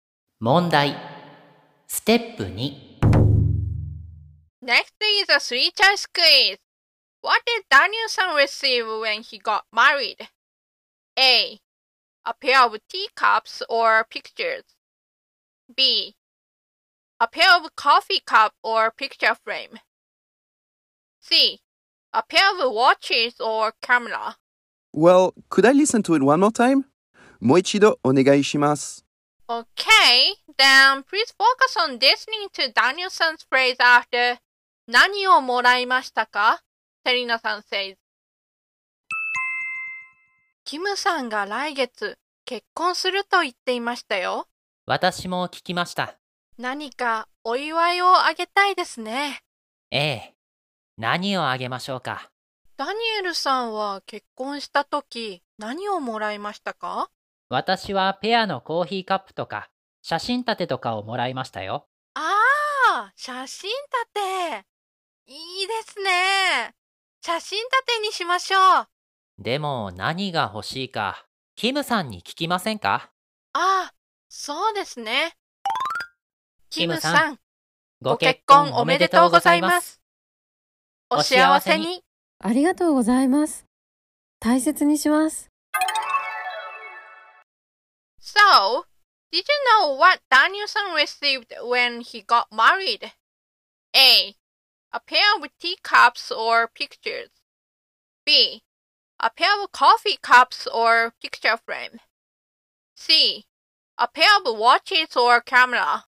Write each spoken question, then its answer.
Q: What did Danielson receive when he got married?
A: So the answer is B.